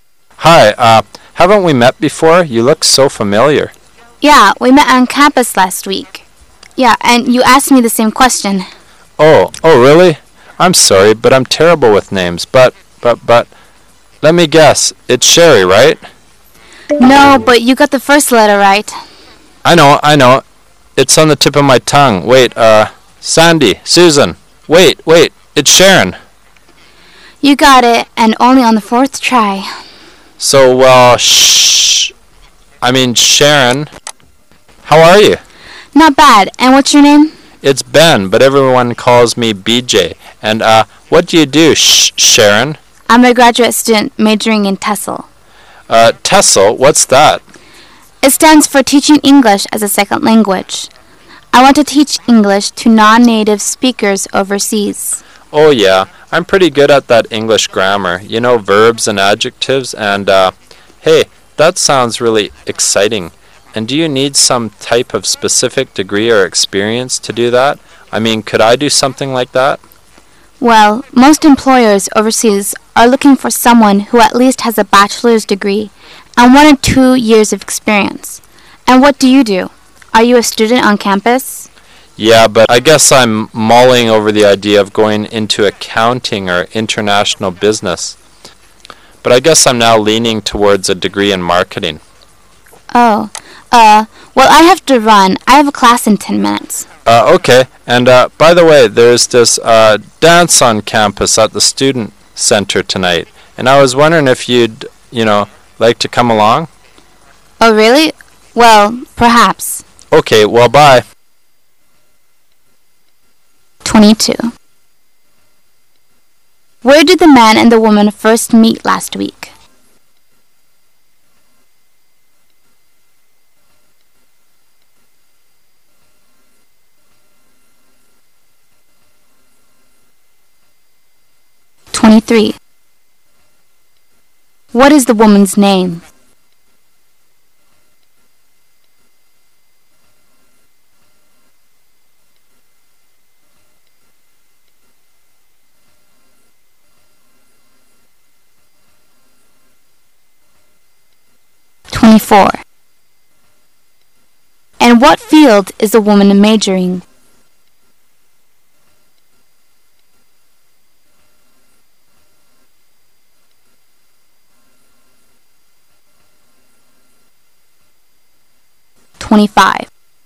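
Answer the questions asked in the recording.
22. On campus
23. Sharon
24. TESOL (Teaching English as a Second Language)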